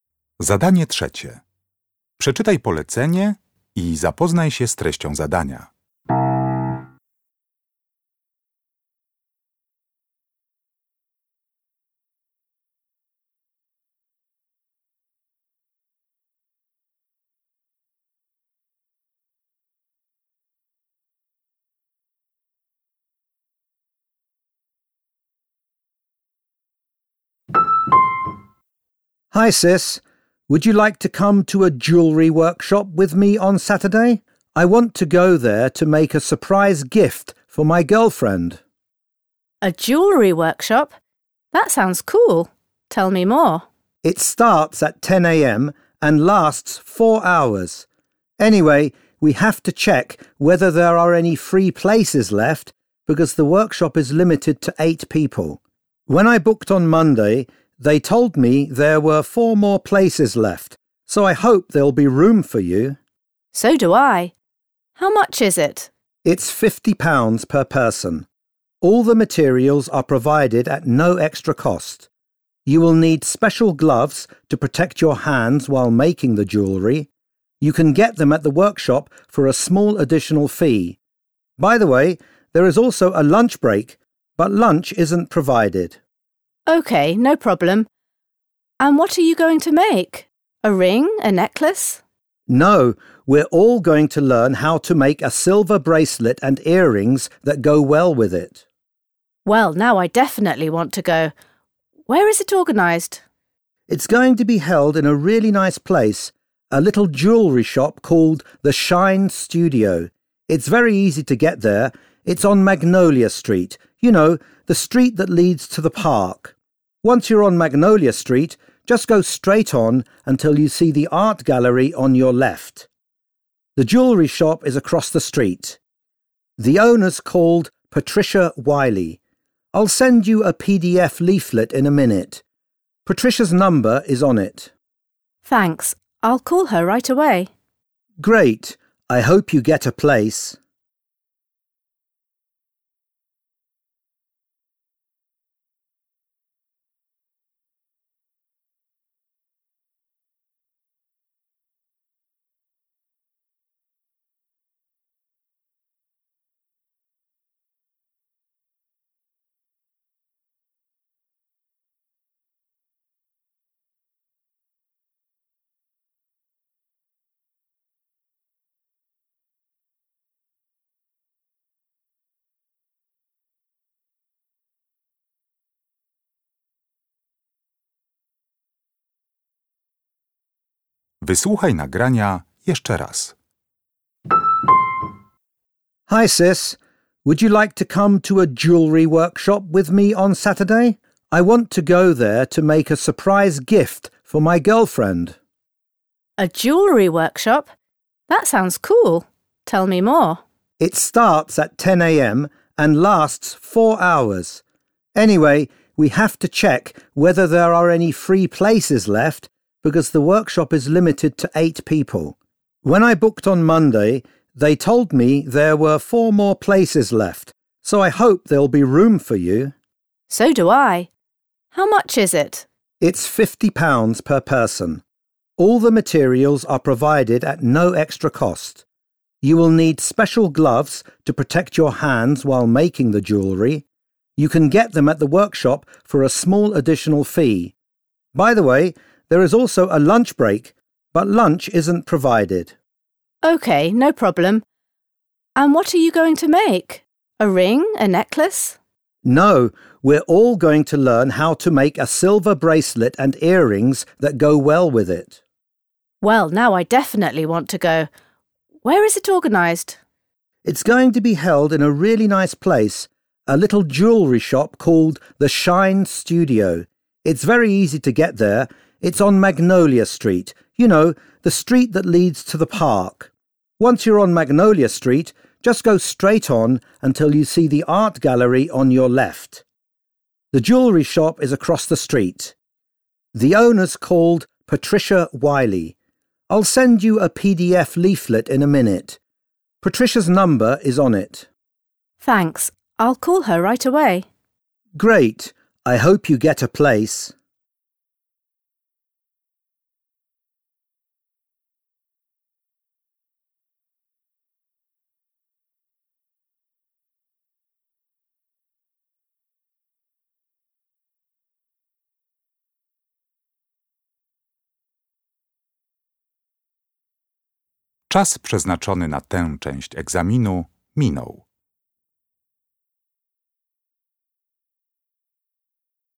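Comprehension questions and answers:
Uruchamiając odtwarzacz z oryginalnym nagraniem CKE usłyszysz dwukrotnie rozmowę na temat warsztatów tworzenia biżuterii. Na podstawie informacji zawartych w nagraniu uzupełnij luki 3.1.–3.4. w ulotce reklamowej, tak aby jak najbardziej precyzyjnie oddać sens wysłuchanego tekstu. Luki należy uzupełnić w języku angielskim.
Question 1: Number of participants – up to 3.1. .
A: 8

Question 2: Don't miss this chance to create a silver bracelet and matching 3.3. .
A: earrings

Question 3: Location: The Shine Studio on Magnolia Street – opposite the 3.4. .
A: art gallery

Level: poziom podstawowy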